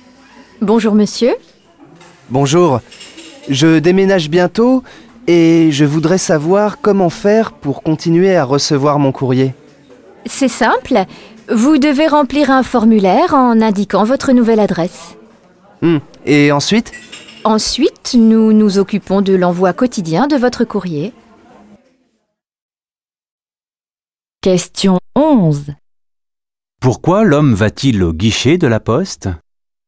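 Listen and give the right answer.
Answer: Pour continuer à recevoir son courrier après son déménagement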